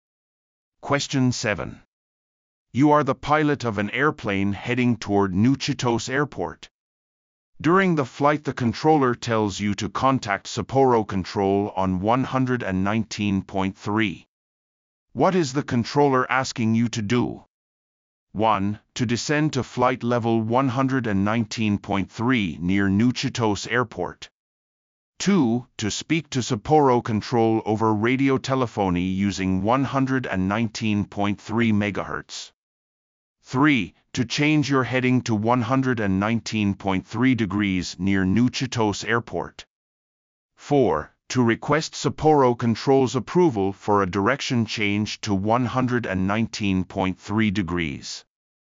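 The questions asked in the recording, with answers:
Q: What is the controller asking you to do?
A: 2: To speak to Sapporo Control over radio telephony using 119.3 MHz.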